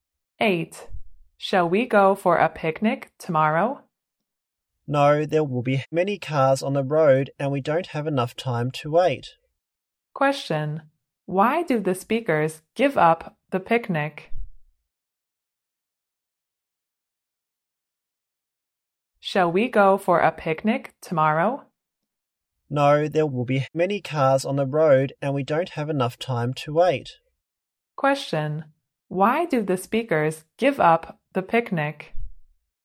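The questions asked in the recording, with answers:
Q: Question, why do the speakers give up the picnic?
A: There will be many cars on the road and they don't have enough time to wait.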